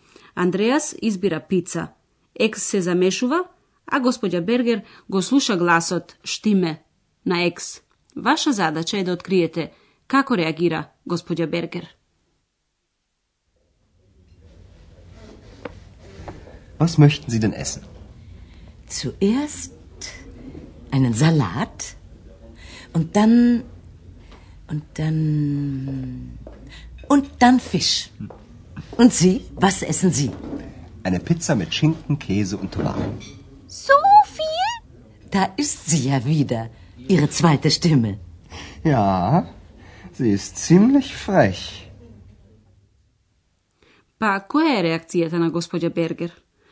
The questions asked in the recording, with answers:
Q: Pa, koja je reakcija na gospođa Berger?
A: таа зборува за вториот глас на Андреас и ужива во разонодата.